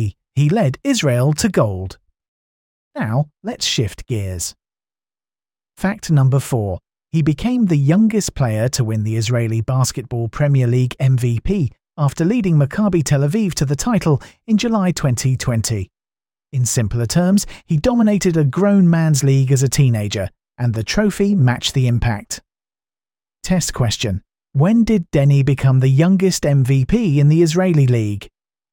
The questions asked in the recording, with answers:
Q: When did Denny become the youngest MVP in the Israeli league?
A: Correct answer. July 2020.